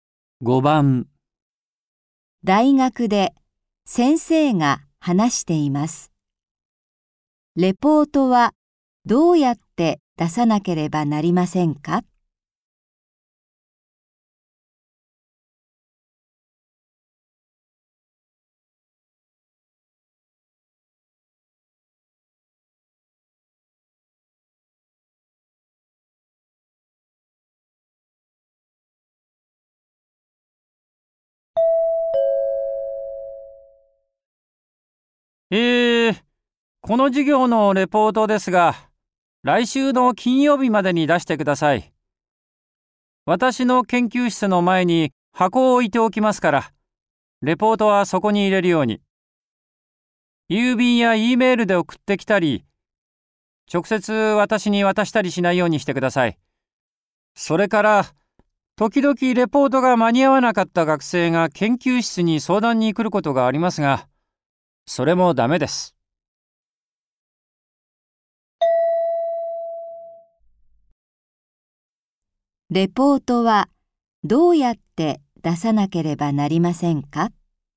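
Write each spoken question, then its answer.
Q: レポートはどうやって出さなければなりませんか?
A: 研究室の前の箱に入れる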